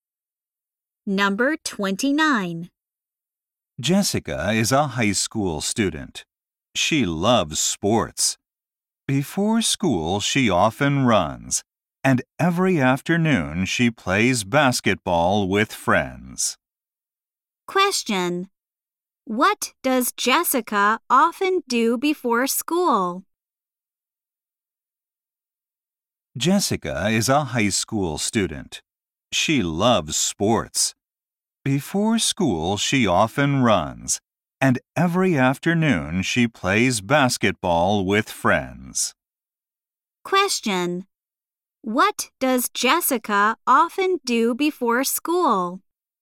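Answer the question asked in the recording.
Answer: She runs.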